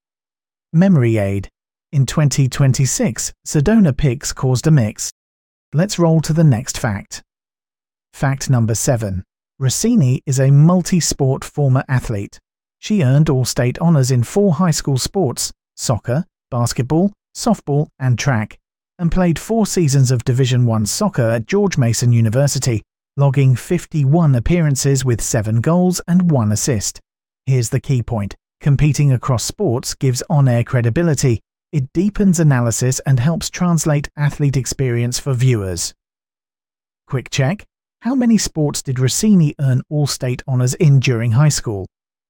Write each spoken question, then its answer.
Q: How many sports did Rossini earn All-State honors in during high school?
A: Correct answer. 4.